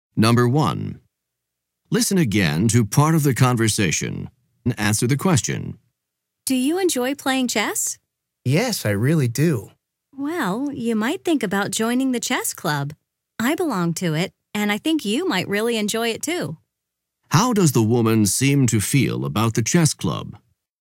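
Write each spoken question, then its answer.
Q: How does the woman seem to feel about the chess club?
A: She likes it and recommends joining it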